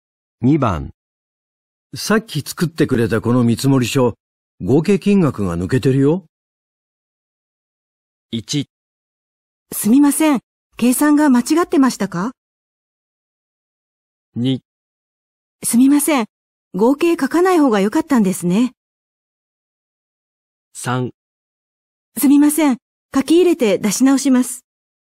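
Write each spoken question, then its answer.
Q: さっき作ってくれたこの見積もり書、合計金額が抜けてるよ。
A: 3: すみません、書き入れて出し直します。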